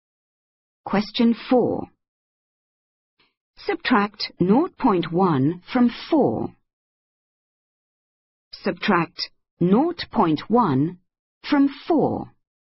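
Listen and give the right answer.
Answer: 3.9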